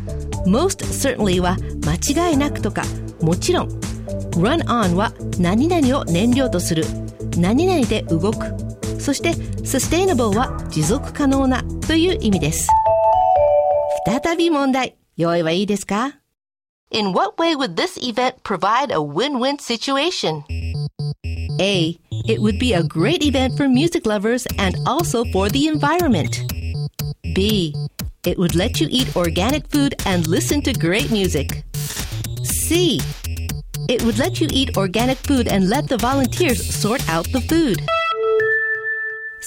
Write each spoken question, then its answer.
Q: In what way would this event provide a win-win situation?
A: 正解は A. It would be a great event for music lovers and also for the environment.